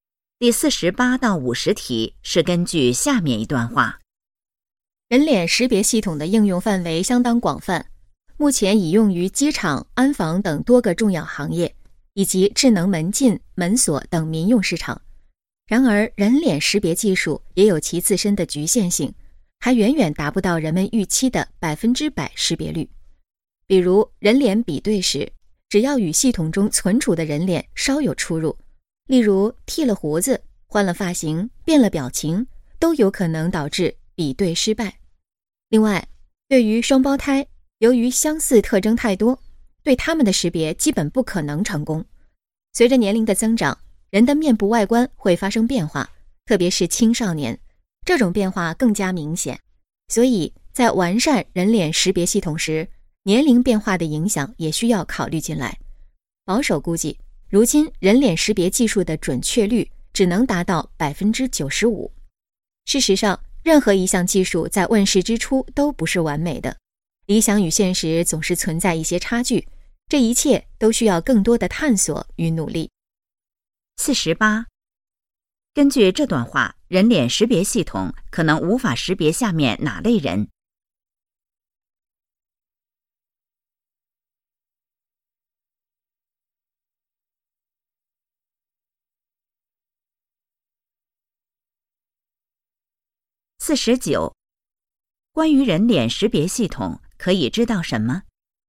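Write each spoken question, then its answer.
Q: 根据这段话,人脸识别系统可能无法识别下面哪类人?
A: 双胞胎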